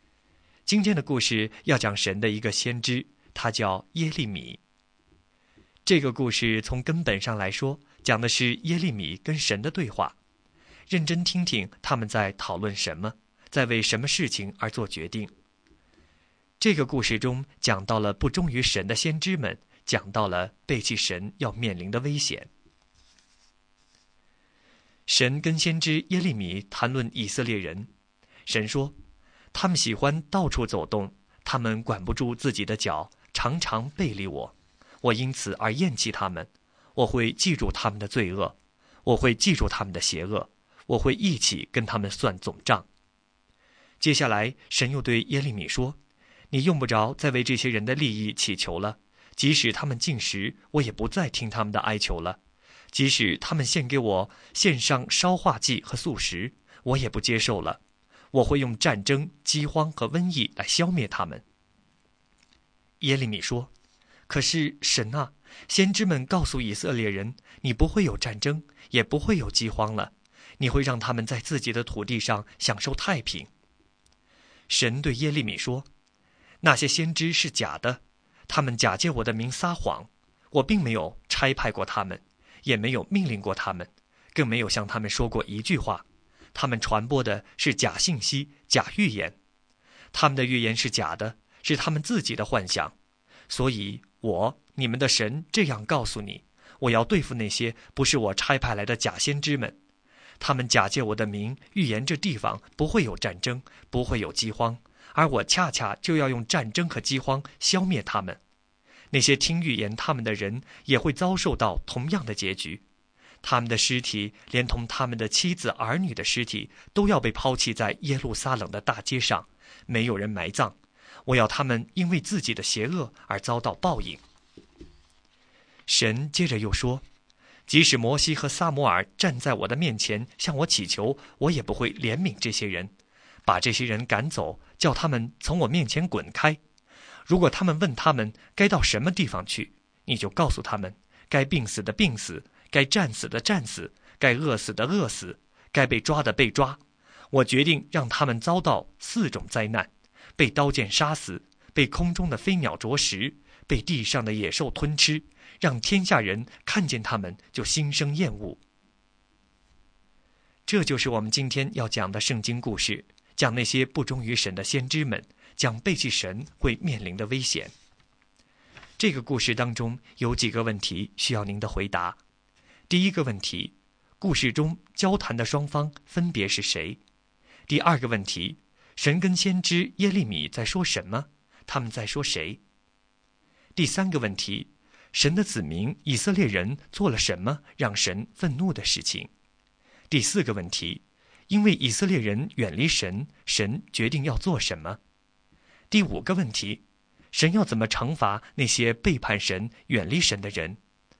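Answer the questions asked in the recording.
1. 神和先知耶利米
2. 在说以色列人背离神,神要惩罚他们
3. 他们到处走动,常常背离神,犯罪作恶
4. 不再听他们的祈求,用战争、饥荒和瘟疫消灭他们
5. 让他们被刀剑杀死、被飞鸟啄食、被野兽吞吃,病死、饿死或被抓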